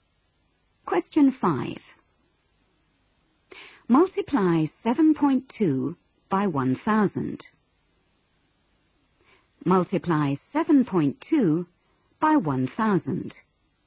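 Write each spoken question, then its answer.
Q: Multiply 7.2 by 1,000.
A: 7200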